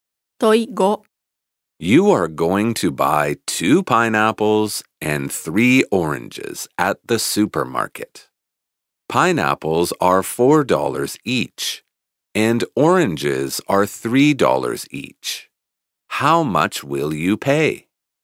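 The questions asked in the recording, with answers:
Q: How much will you pay?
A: $17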